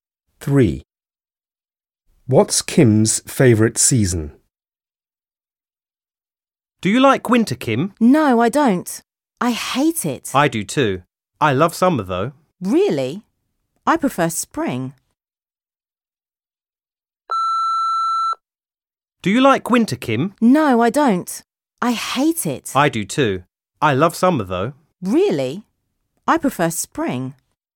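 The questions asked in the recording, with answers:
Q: What's Kim's favourite season?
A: spring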